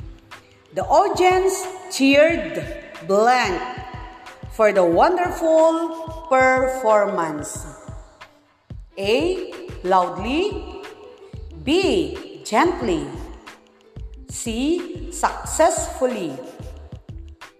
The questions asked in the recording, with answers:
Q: The audience cheered blank for the wonderful performance.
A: The answer is letter A, loudly.